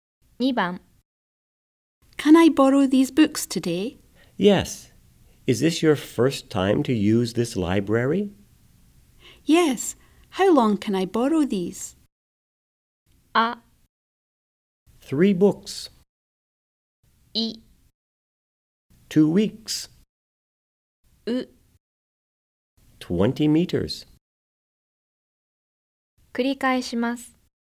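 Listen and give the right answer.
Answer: I: 2 weeks.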